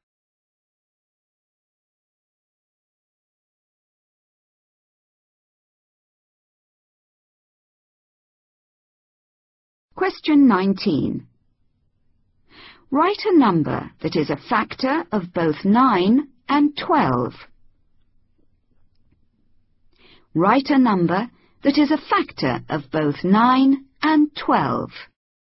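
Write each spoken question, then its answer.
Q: Write a number that is a factor of both 9 and 12.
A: 1 or 3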